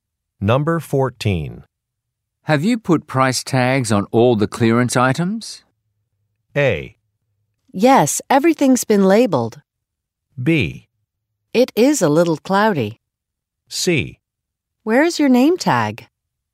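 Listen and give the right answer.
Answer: A: Yes, everything's been labeled.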